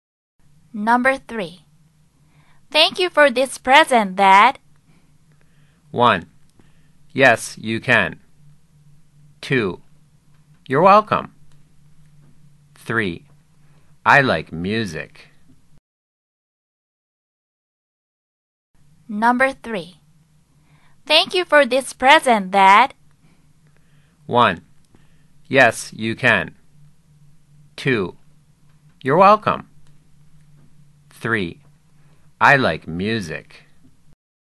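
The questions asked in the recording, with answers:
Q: Thank you for this present, Dad.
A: 2: You're welcome.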